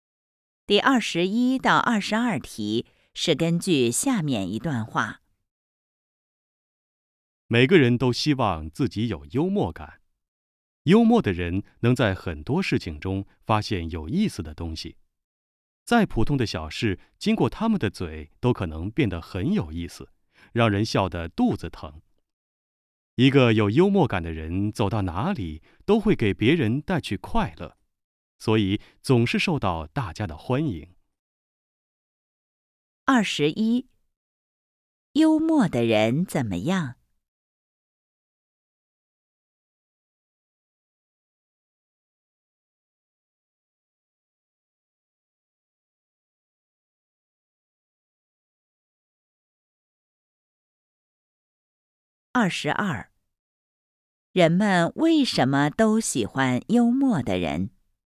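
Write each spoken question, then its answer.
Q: 人们为什么都喜欢幽默的人?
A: 他们能给别人带去快乐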